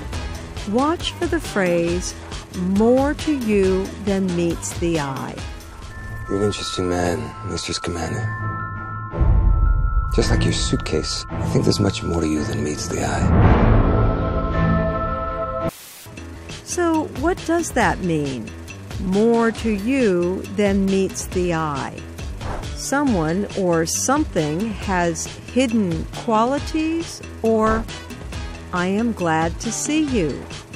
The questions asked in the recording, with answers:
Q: So what does that mean? More to you than meets the eye.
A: More to you than meets the eye means someone has hidden qualities.